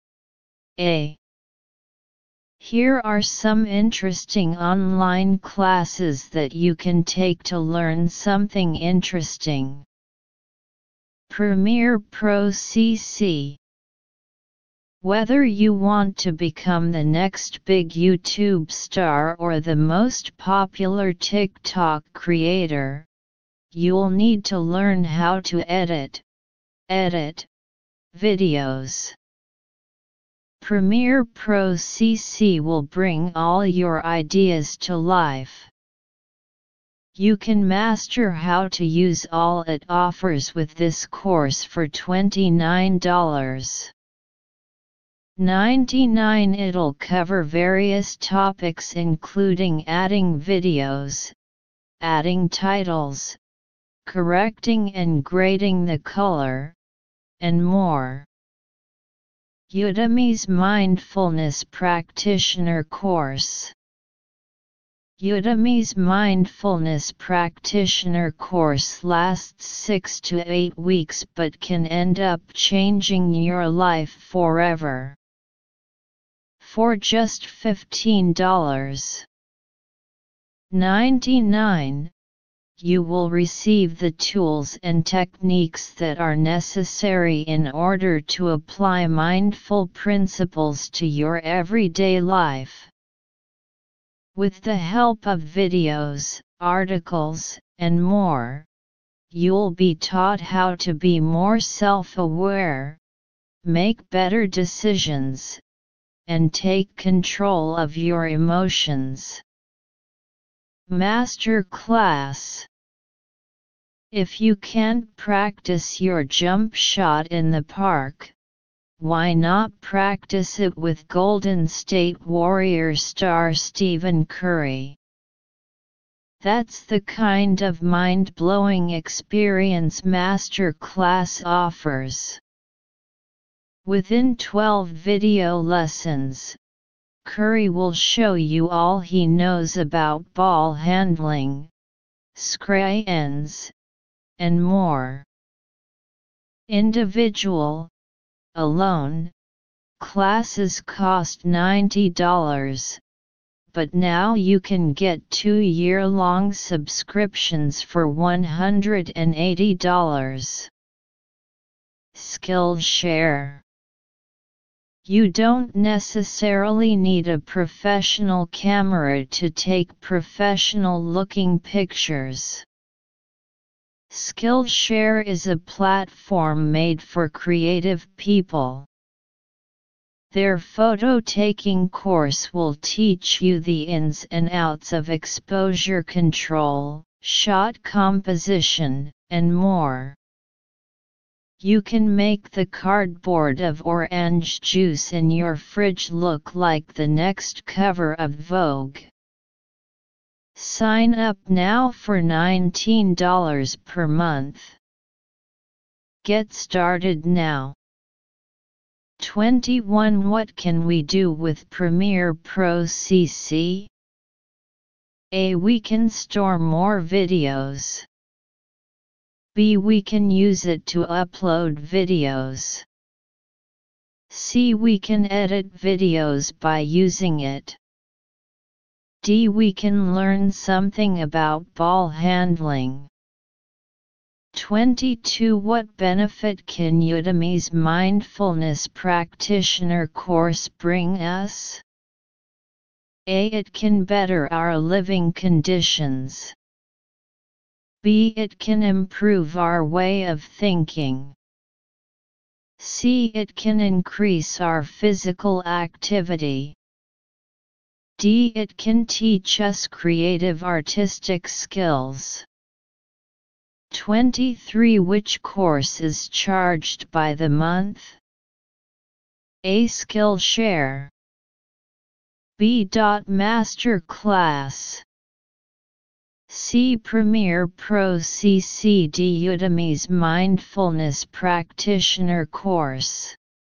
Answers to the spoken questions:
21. 21. C.
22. 22. B.
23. 23. A.